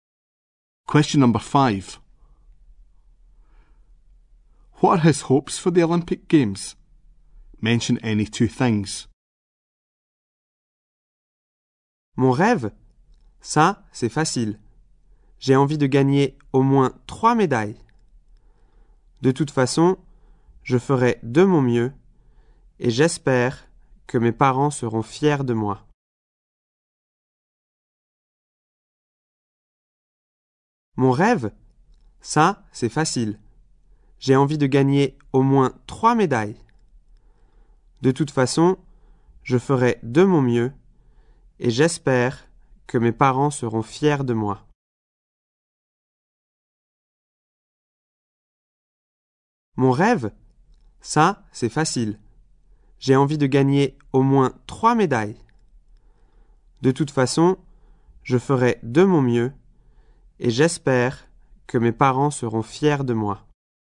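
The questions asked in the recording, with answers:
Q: What are his hopes for the Olympic Games?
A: To win at least 3 medals; to do his best; that his parents will be proud of him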